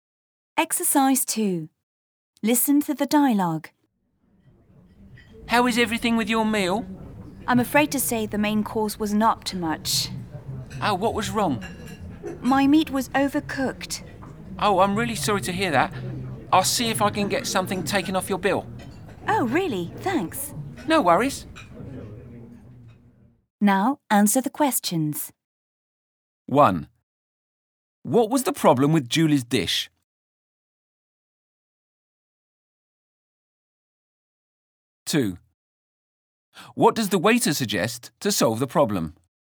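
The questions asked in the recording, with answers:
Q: What was the problem with Julie's dish?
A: Her meat was overcooked.

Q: What does the waiter suggest to solve the problem?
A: Getting something taken off her bill.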